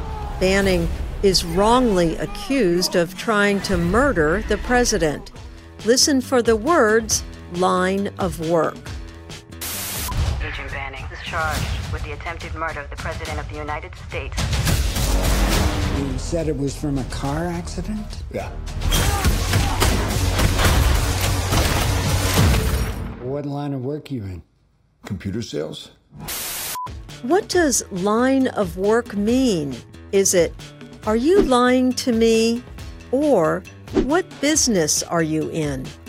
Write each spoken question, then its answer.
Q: What does line of work mean?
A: Line of work means the business you are in.